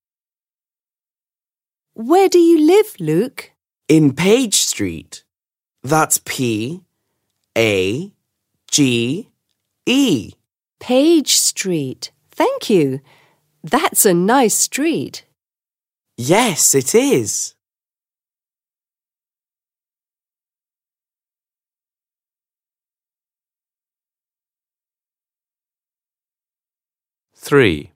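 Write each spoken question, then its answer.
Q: Where do you live, Luke?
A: Page Street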